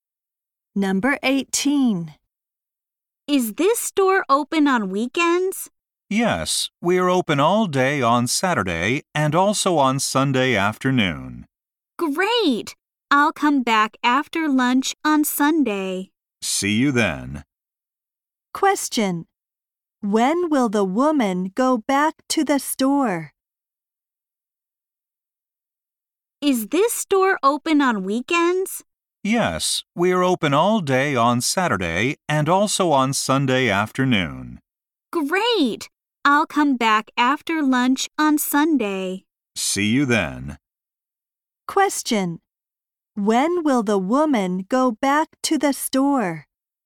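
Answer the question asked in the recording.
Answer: On Sunday afternoon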